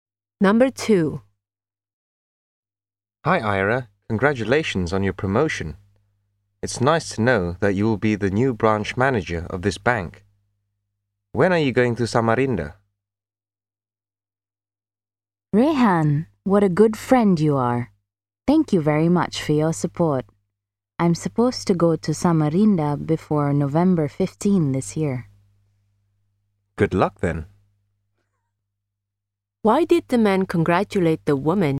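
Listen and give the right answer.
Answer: Because she was promoted to be the new branch manager of the bank.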